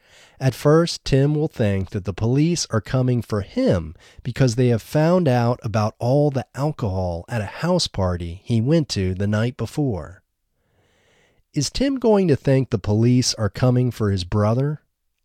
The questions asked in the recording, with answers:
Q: Is Tim going to think the police are coming for his brother?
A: No, he isn't going to think the police are coming for his brother.